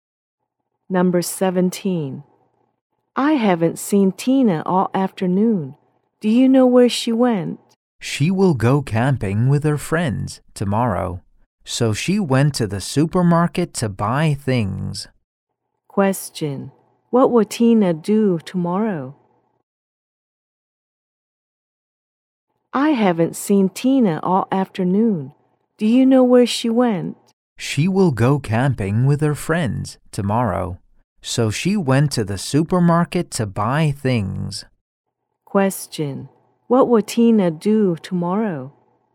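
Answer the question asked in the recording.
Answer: Go camping with her friends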